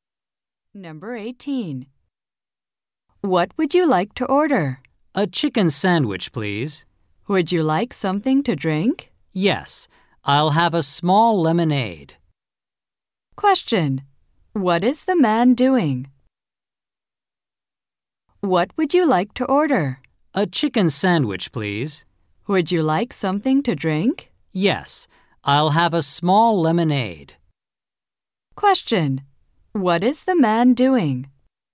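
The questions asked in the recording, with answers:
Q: What is the man doing?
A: Ordering food.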